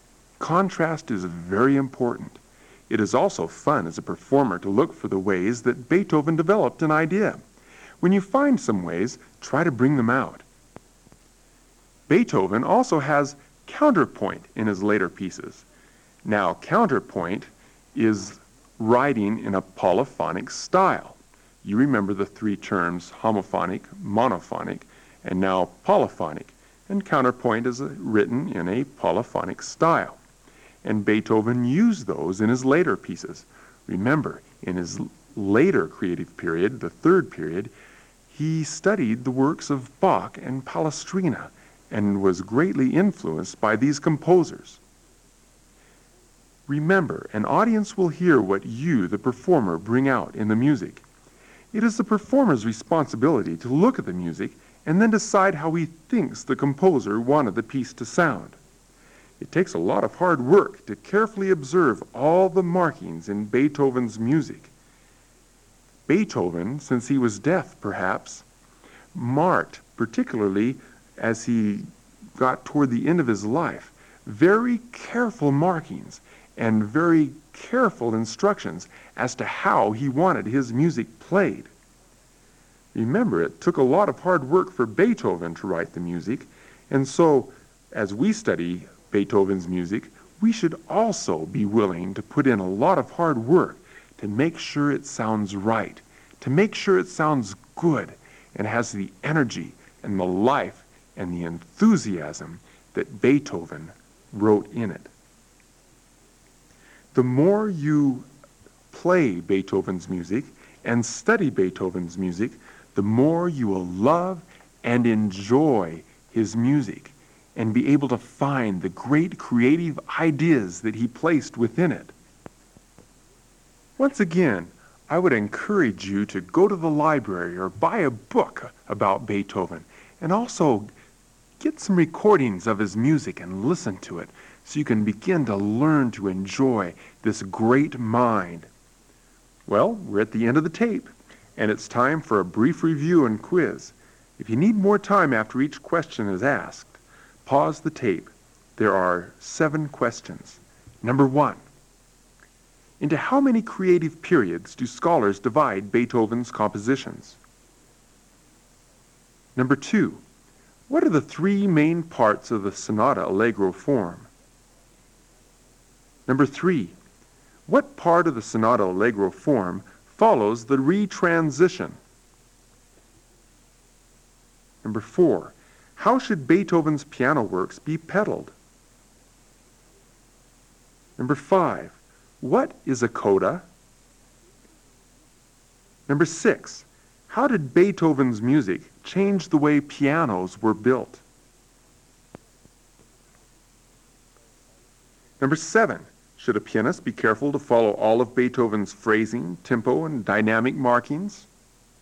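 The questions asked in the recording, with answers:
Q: Should a pianist be careful to follow all of Beethoven's phrasing, tempo, and dynamic markings?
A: Yes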